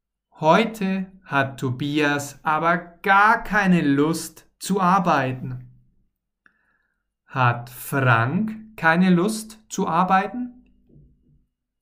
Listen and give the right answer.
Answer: Nein, nicht Frank hat keine Lust, sondern Tobias.